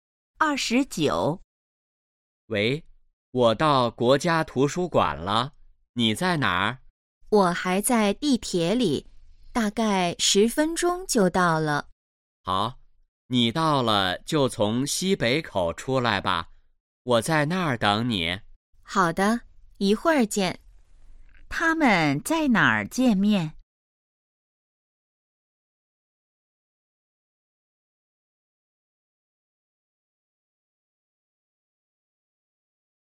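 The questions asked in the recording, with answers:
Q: 他们在哪儿见面?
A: 国家图书馆西北口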